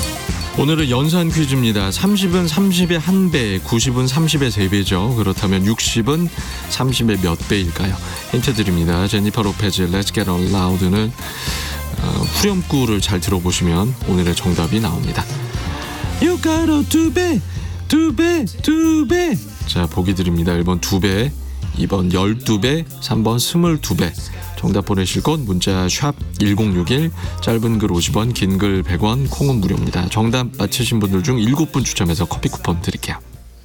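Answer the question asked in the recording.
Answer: 1: 두 배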